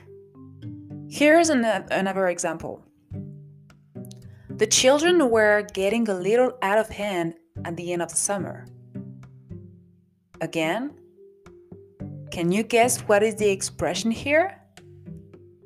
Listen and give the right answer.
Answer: To get out of hand, of course.